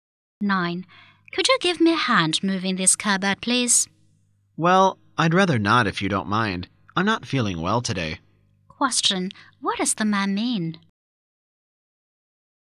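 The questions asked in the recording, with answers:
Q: What does the man mean?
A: He won't help because he feels unwell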